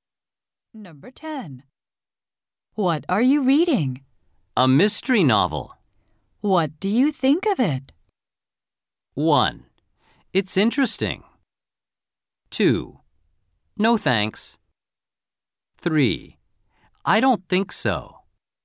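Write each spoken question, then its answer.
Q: What do you think of it?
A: 1: It's interesting.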